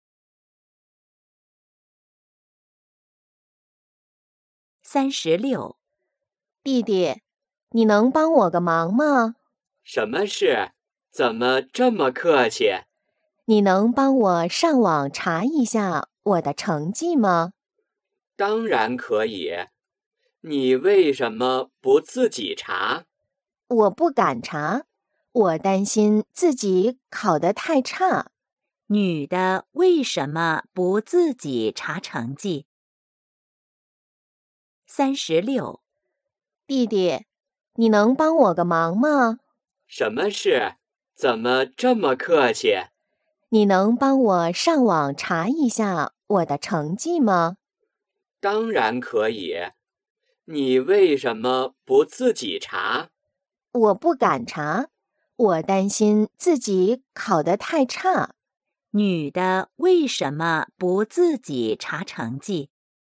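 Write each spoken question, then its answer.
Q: 女的为什么不自己查成绩?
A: 担心自己考得太差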